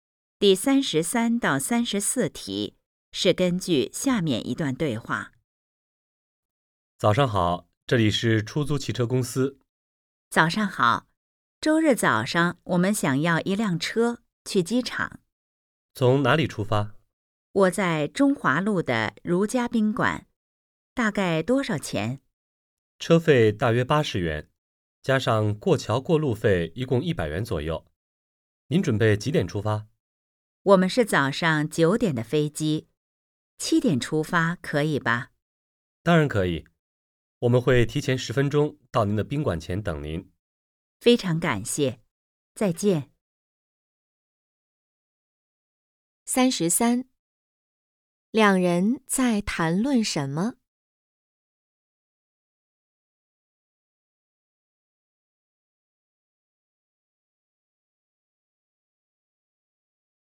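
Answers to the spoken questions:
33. 订出租车去机场
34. 20元左右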